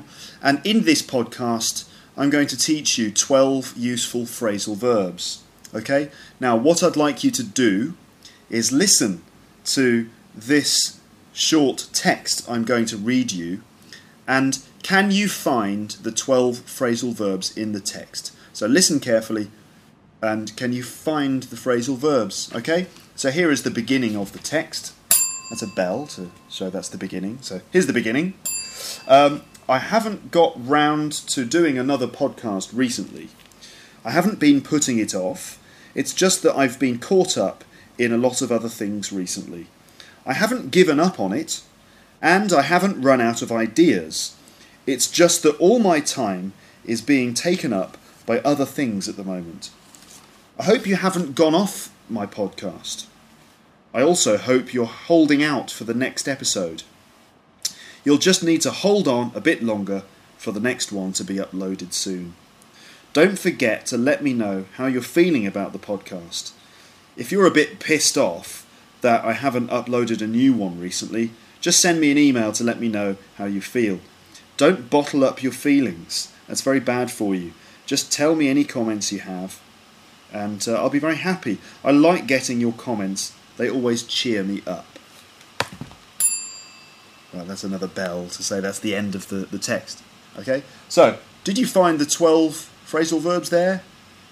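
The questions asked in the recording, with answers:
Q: So, did you find the 12 Phrasal verbs there?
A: get round to, put off, be caught up in, give up on, run out of, take up, go off, hold out for, hold on, be pissed off, bottle up, cheer up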